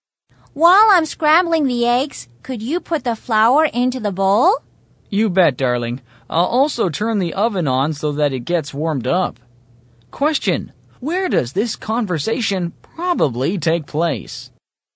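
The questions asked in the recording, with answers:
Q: Where does this conversation probably take place?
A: In a kitchen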